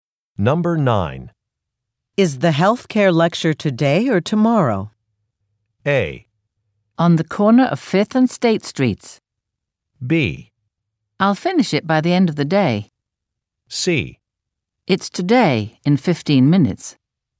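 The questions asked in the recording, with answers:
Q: Is the healthcare lecture today or tomorrow?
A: C: It's today, in 15 minutes.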